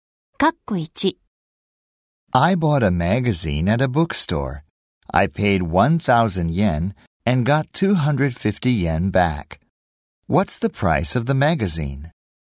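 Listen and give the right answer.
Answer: 750 yen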